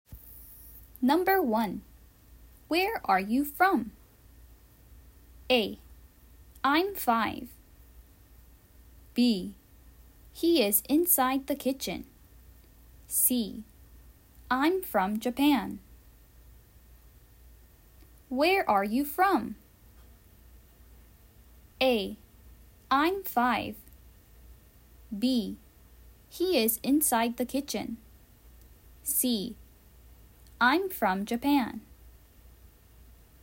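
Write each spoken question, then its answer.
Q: Where are you from?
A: C: I'm from Japan.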